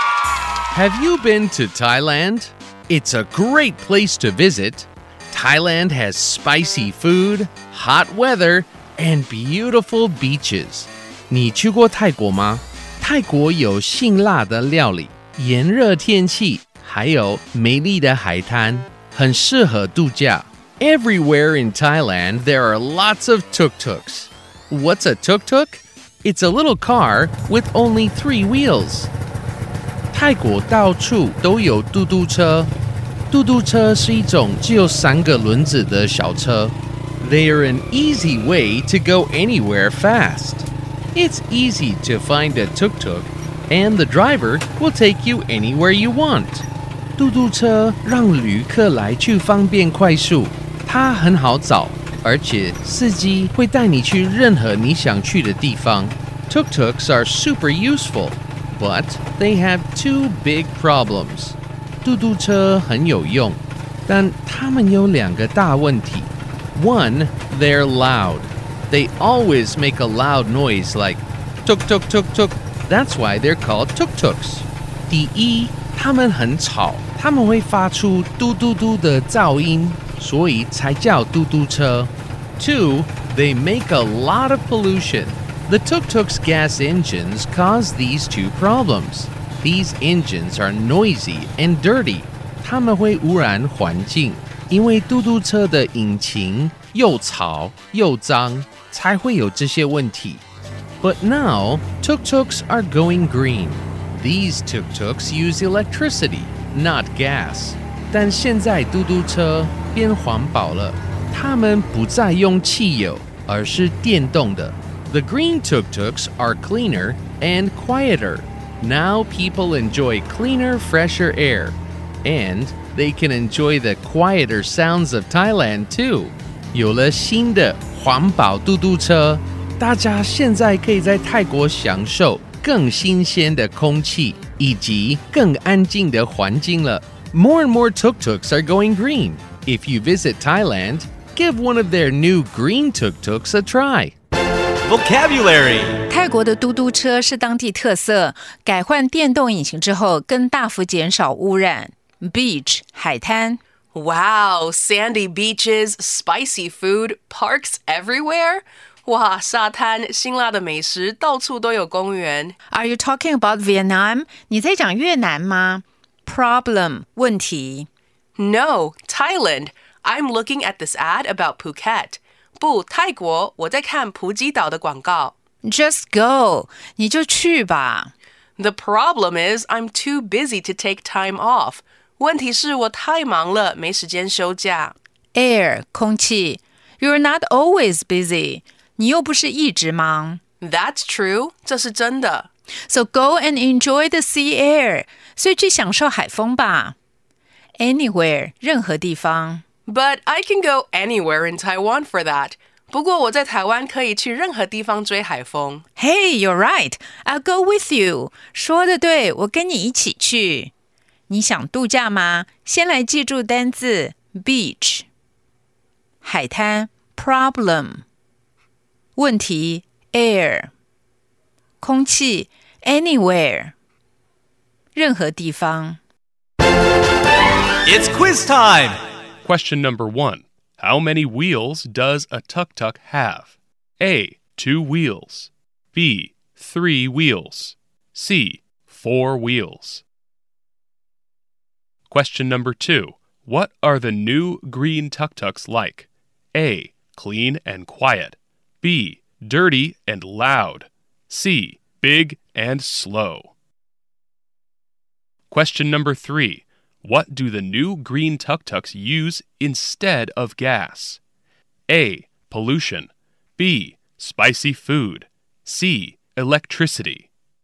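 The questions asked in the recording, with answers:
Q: How many wheels does a tuk-tuk have?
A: B: 3 wheels

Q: What are the new green tuk-tuks like?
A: A: Clean and quiet

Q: What do the new green tuk-tuks use instead of gas?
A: C: Electricity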